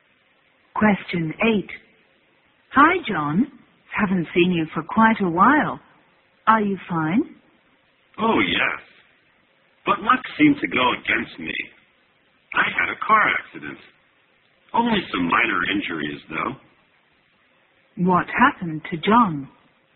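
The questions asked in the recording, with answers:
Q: What happened to John?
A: He had a car accident but was only slightly injured.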